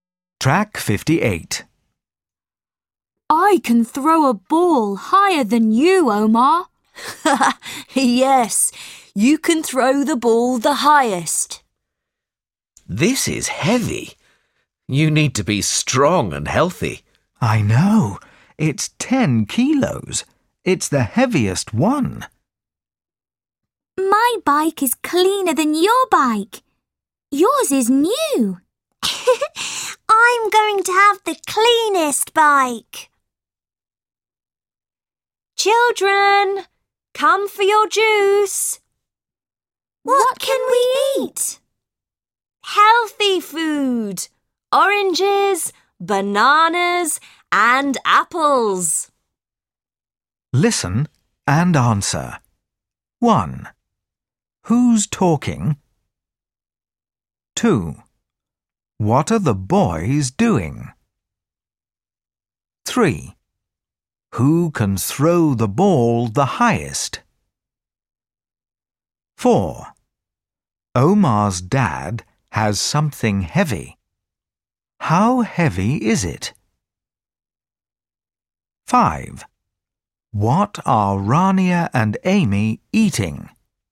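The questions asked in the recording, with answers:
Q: How heavy is it?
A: 10 kilos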